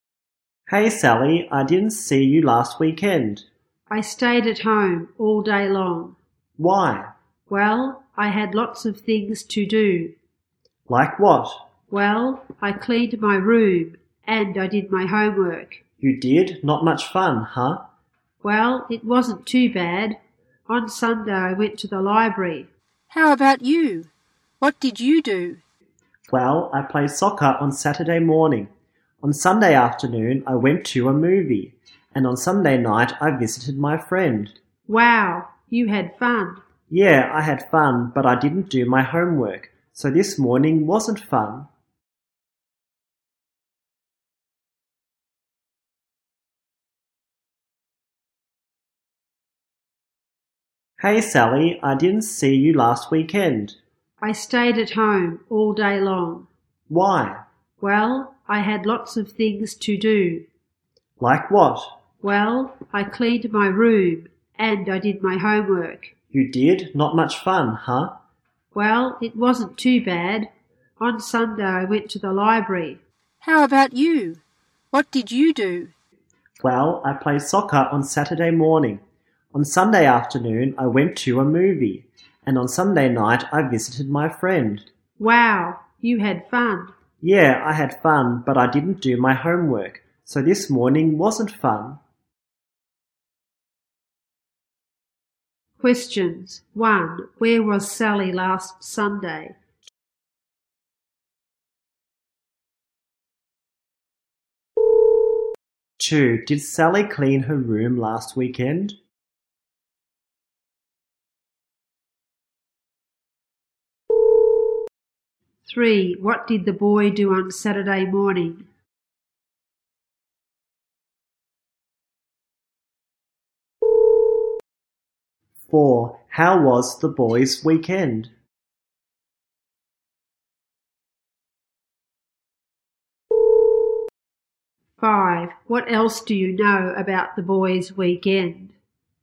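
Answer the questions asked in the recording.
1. At the library
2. Yes, she did
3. He played soccer
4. Fun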